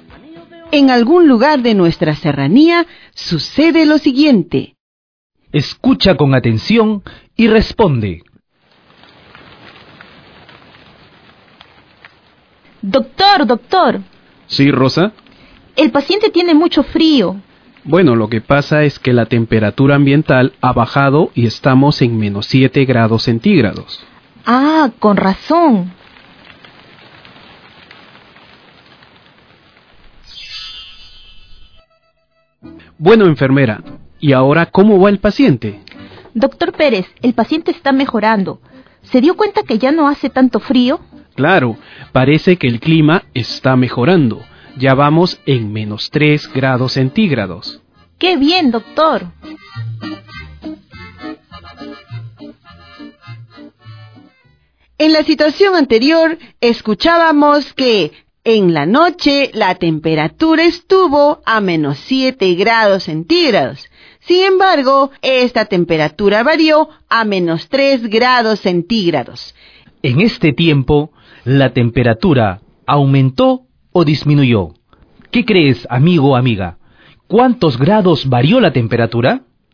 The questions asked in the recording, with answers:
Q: En este tiempo, ¿la temperatura aumentó o disminuyó?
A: Esto quiere decir que la temperatura aumentó 4 grados centígrados